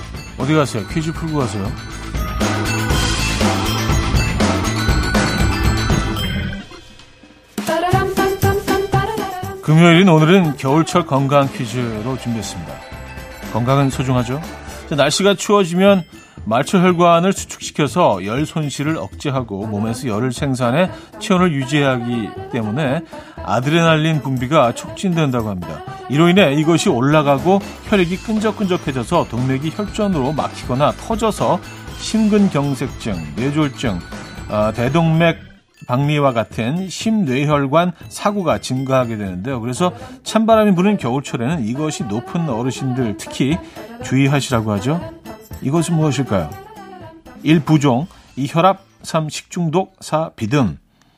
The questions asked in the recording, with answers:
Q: 이것은 무엇일까요? 1. 부종, 2. 혈압, 3. 식중독, 4. 비듬.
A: 정답은 2번 혈압이었습니다.